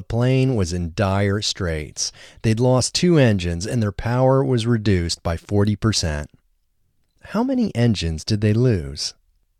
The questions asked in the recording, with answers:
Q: How many engines did they lose?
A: They lost 2 engines.